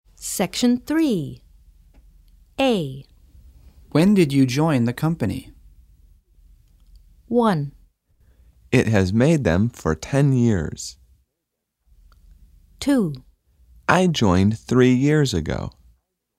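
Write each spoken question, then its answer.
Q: When did you join the company?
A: 2: I joined 3 years ago.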